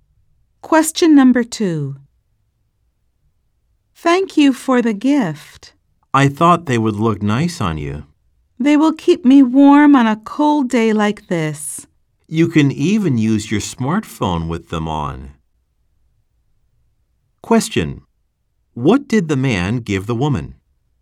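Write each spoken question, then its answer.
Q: What did the man give the woman?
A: Gloves (that work with a smartphone)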